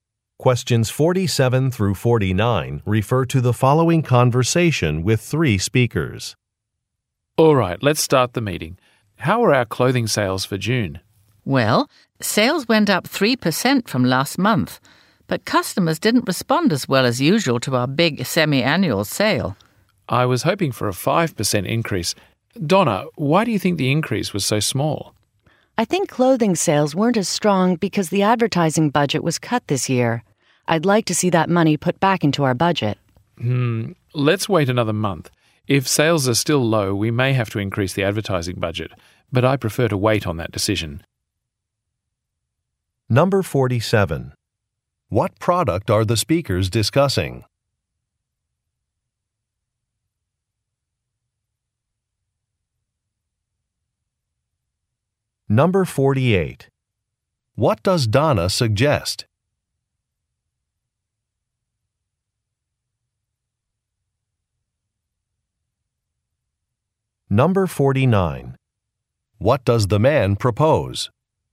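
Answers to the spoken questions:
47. Clothing
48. Restoring the advertising budget
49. Waiting another month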